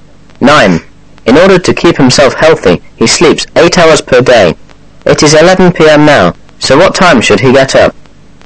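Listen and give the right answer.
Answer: 7 a.m.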